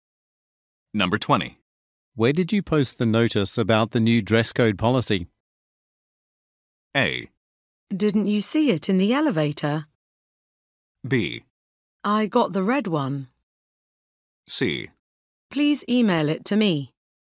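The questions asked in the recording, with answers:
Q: Where did you post the notice about the new dress code policy?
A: A: Didn't you see it in the elevator?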